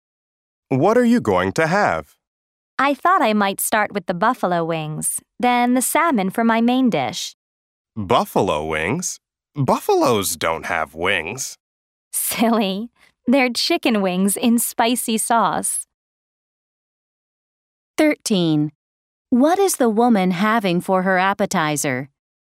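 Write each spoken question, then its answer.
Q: What is the woman having for her appetizer?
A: Buffalo wings (chicken wings in spicy sauce)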